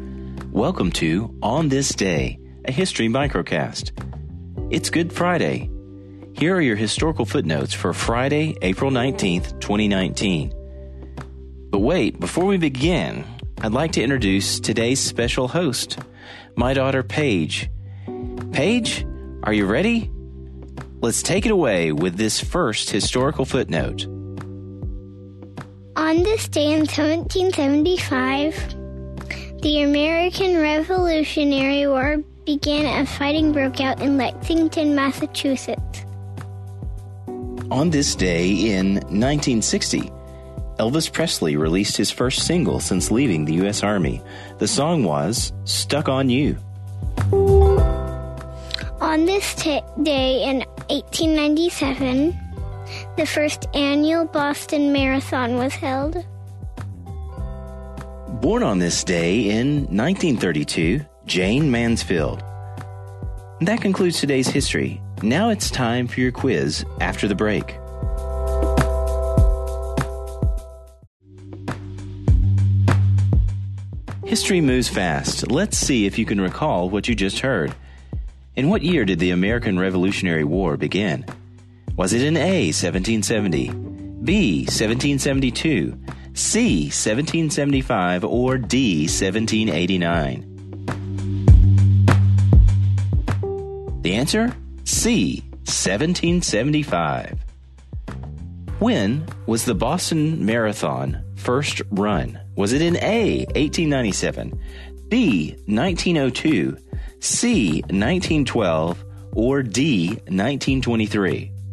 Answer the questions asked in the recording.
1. The answer, C, 1775.
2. The answer? A, 1897.